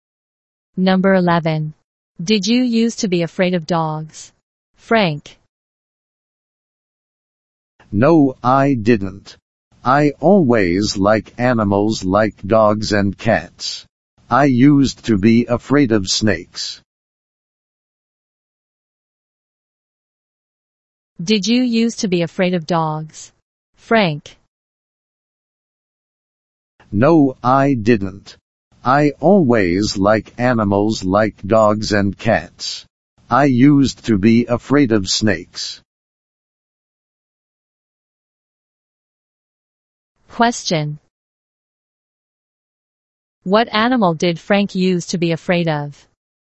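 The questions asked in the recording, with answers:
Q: What animal did Frank use to be afraid of?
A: Snakes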